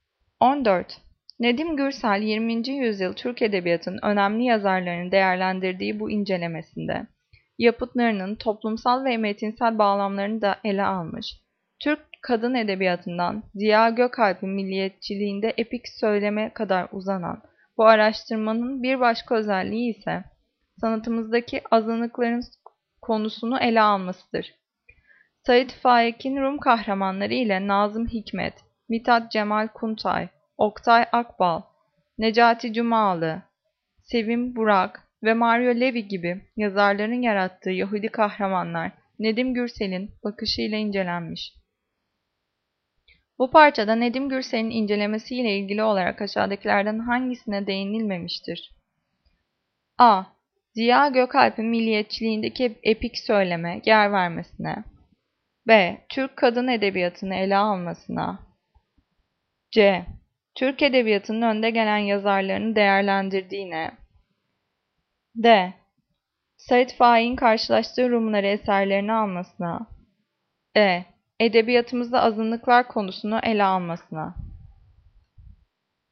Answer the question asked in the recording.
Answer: Cevap D. Sait Faik'in karşılaştığı Rumları eserlerini almasına.